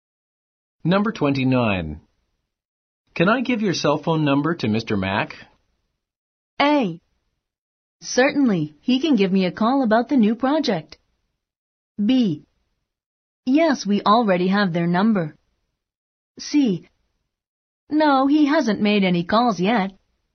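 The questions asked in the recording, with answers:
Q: Can I give your cell phone number to Mr.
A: A: Certainly, he can give me a call about the new project.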